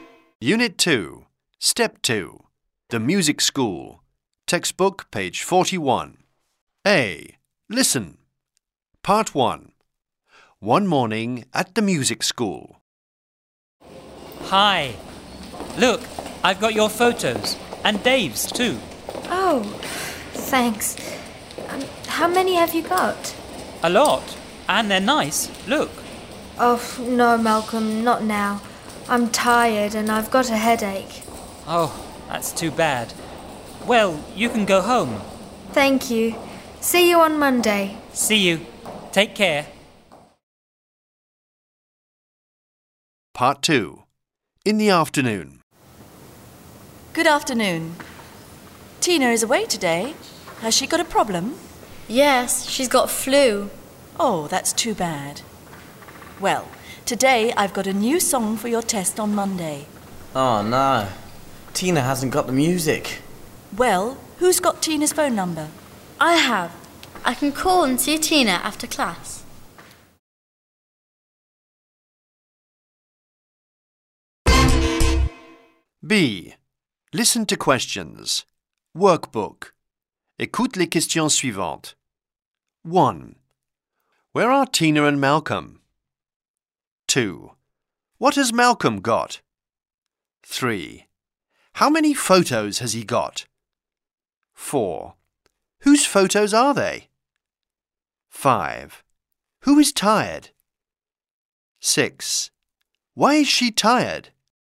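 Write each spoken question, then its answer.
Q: Where are Tina and Malcolm?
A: At the music school

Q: What has Malcolm got?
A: Photos

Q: How many photos has he got?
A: A lot

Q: Whose photos are they?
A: Tina's and Dave's

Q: Who is tired?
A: Tina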